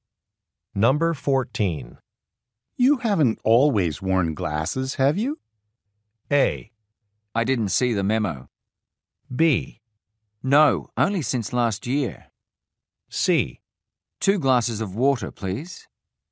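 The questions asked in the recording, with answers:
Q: You haven't always worn glasses, have you?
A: B: No, only since last year.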